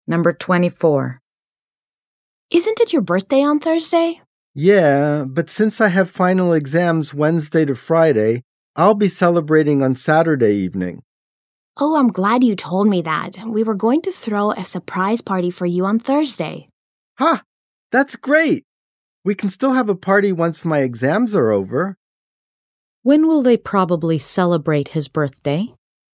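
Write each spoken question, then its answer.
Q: When will they probably celebrate his birthday?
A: On Saturday evening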